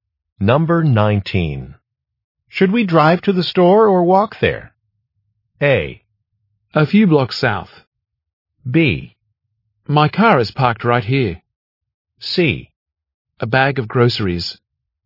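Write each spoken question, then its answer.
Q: Should we drive to the store or walk there?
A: B: My car is parked right here.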